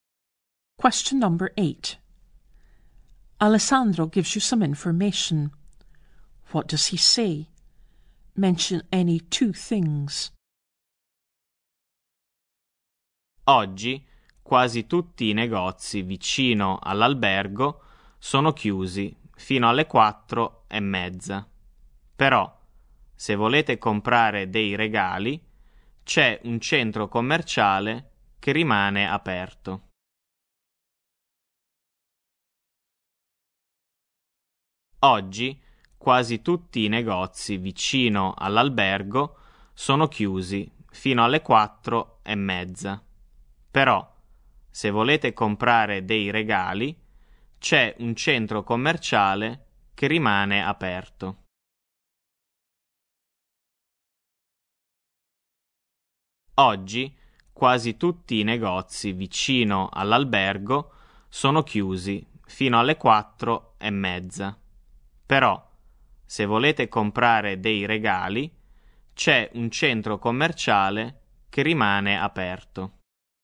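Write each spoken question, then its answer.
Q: What does he say? Mention any two things.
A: Most shops near the hotel are closed until 4:30; a shopping centre stays open if you want to buy presents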